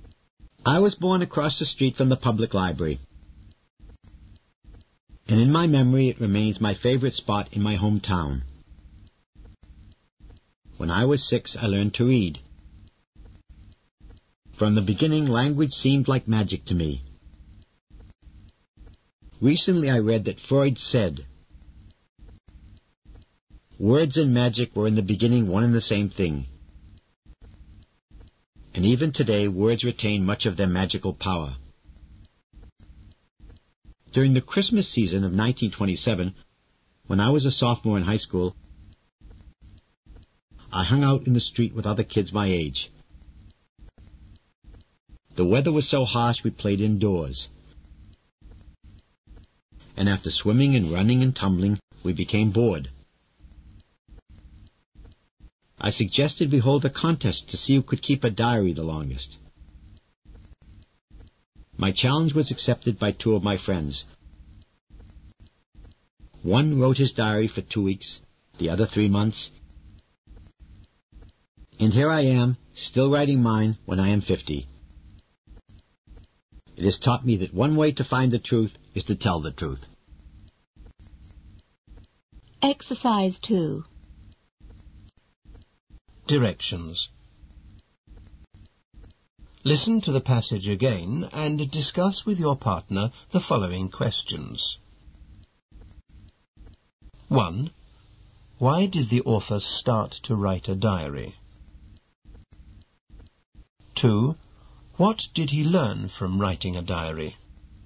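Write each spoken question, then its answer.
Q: Why did the author start to write a diary?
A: Because he suggested a contest with his friends to see who could keep a diary the longest, as they were bored indoors.

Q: What did he learn from writing a diary?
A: That one way to find the truth is to tell the truth.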